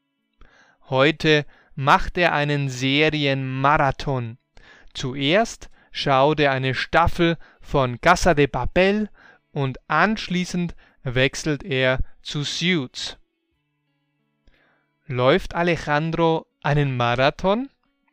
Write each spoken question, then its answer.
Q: Läuft Alejandro einen Marathon?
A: Nein, er läuft nicht einen echten Marathon.